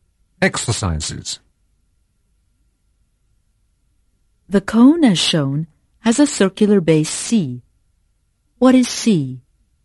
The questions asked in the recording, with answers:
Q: What is C?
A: C is a circle.